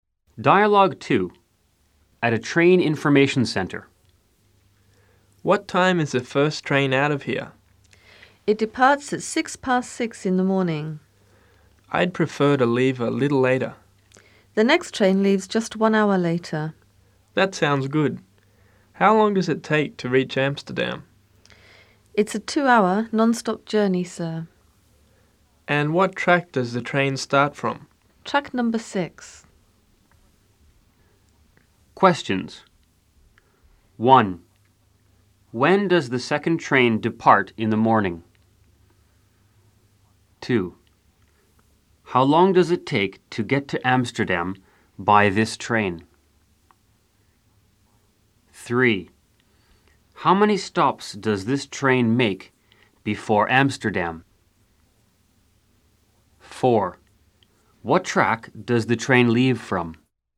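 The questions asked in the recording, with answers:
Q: When does the second train depart in the morning?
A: At 7:06

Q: How long does it take to get to Amsterdam by this train?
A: 2 hours

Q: How many stops does this train make before Amsterdam?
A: None (non-stop)

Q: What track does the train leave from?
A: Track 6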